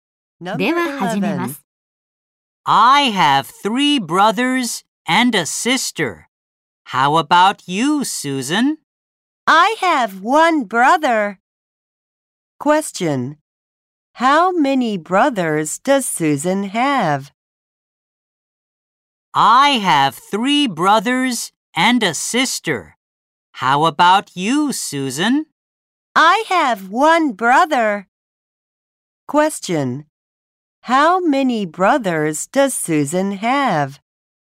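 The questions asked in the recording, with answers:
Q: How many brothers does Susan have?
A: One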